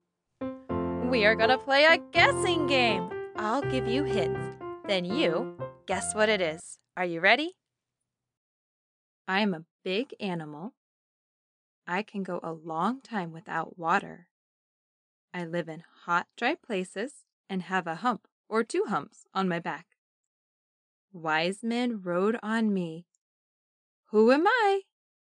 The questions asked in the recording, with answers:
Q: Who am I?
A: Camel.